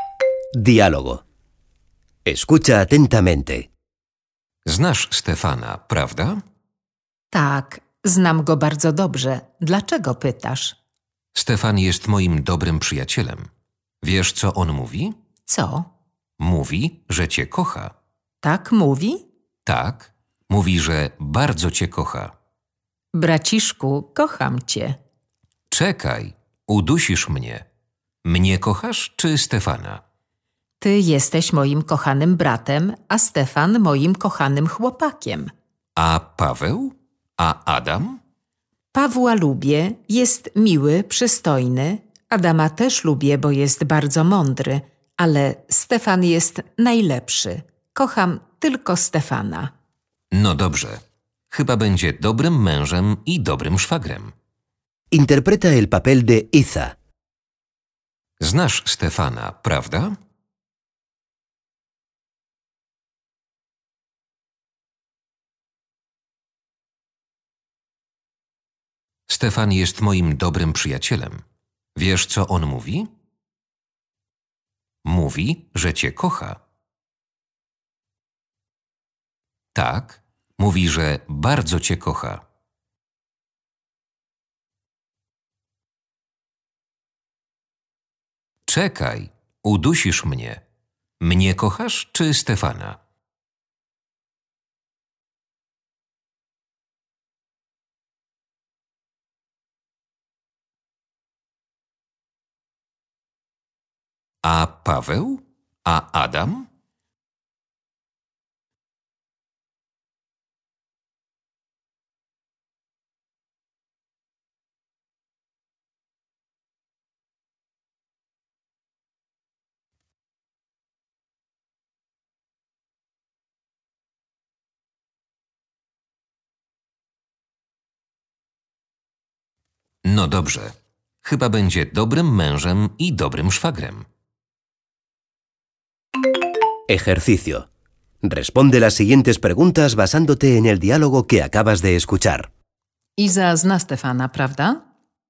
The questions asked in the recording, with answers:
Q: Iza zna Stefana, prawda?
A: Tak. Oczywiście.